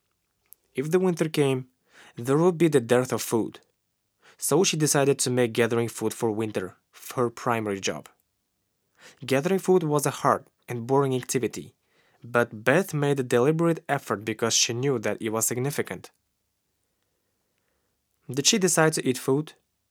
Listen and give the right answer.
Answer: No, she didn't decide to eat food.